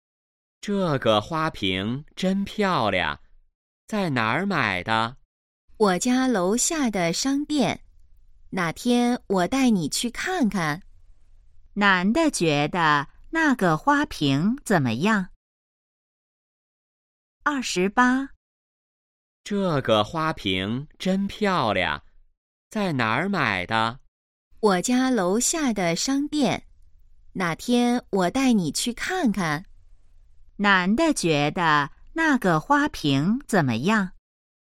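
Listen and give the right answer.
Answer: 很漂亮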